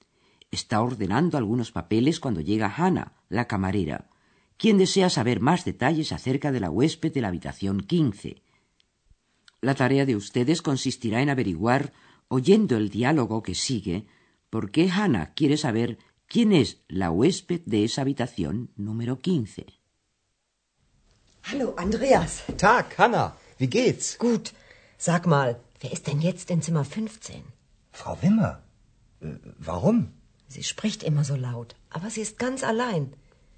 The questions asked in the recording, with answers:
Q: La tarea de ustedes consistirá en averiguar, oyendo el diálogo que sigue, por qué Hannah quiere saber quién es la huésped de esa habitación número 15.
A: Hannah desea saber quién es la persona que está hospedada en la habitación número 15, porque se ha dado cuenta de que allí dentro hay una mujer que siempre habla en voz alta.